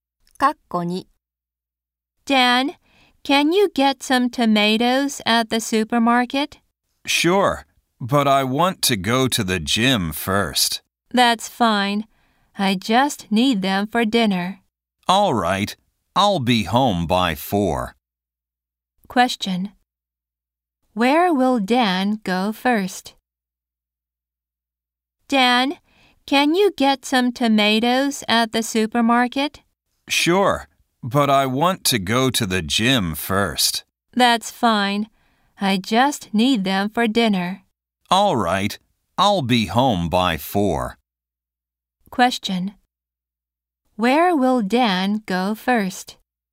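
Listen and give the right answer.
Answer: To the gym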